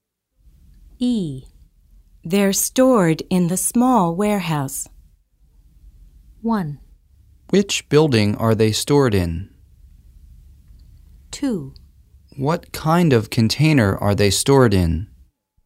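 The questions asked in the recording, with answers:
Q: They're stored in the small warehouse.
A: 1: Which building are they stored in?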